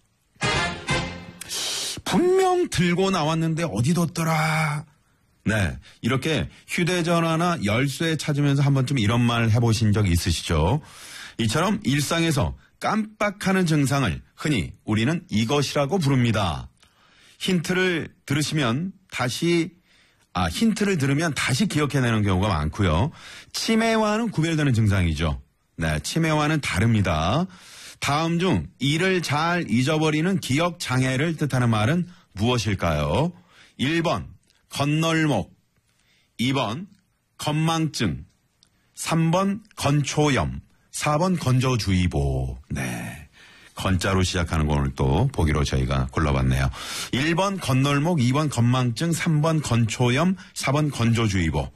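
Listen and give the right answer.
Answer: 2: 건망증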